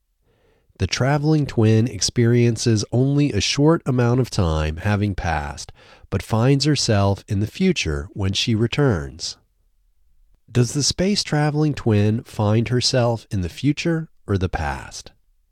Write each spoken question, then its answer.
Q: Does the space-traveling twin find herself in the future or the past?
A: The space-traveling twin finds herself in the future.